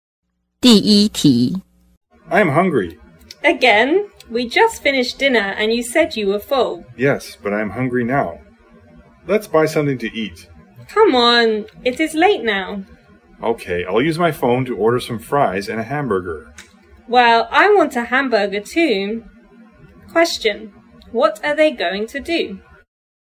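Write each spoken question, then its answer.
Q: Question, what are they going to do?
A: Order fries and hamburgers using the phone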